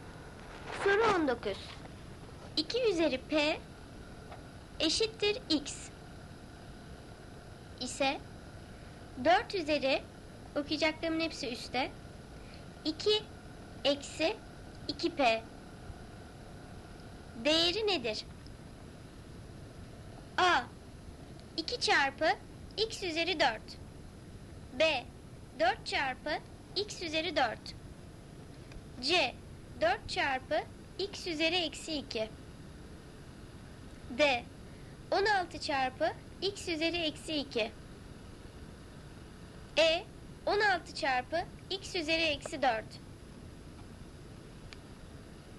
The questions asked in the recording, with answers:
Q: 2 üzeri p eşittir x ise 4 üzeri okuyacaklarımın hepsi üstte 2 eksi 2p değeri nedir?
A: Doğru cevap E. 16 çarpı x üzeri eksi 4.